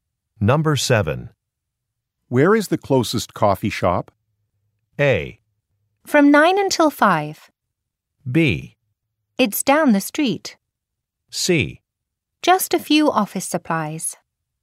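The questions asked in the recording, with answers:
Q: Where is the closest coffee shop?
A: B: It's down the street.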